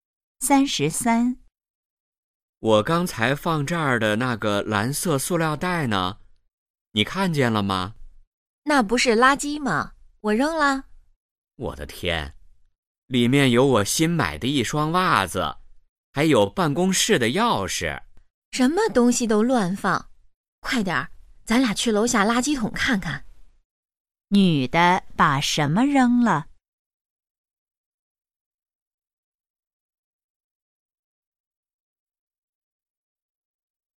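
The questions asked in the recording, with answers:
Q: 女的把什么扔了?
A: 一个蓝色塑料袋(里面有袜子和钥匙)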